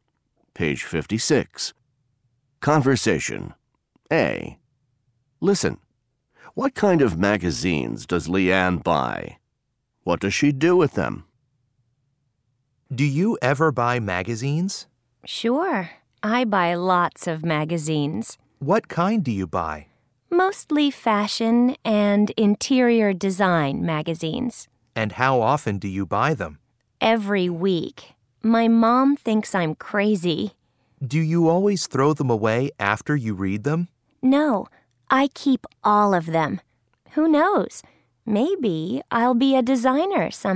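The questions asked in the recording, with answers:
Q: What kind of magazines does Leanne buy?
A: Mostly fashion and interior design magazines

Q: What does she do with them?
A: She keeps all of them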